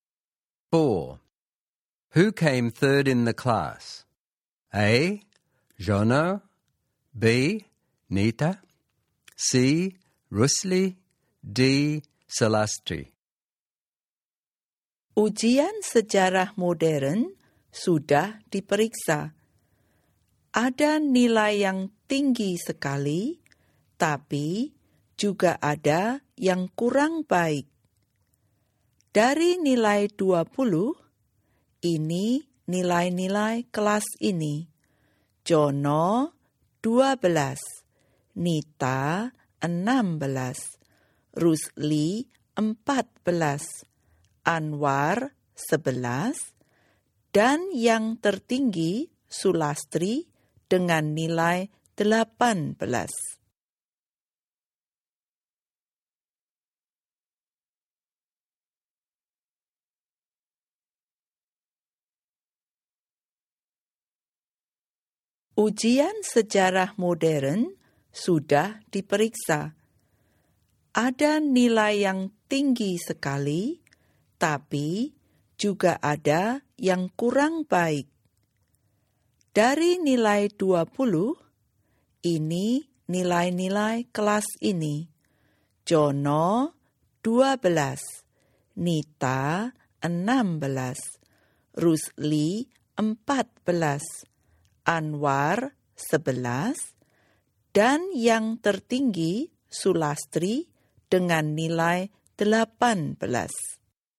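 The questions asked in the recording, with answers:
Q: Who came third in the class?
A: C: Rusli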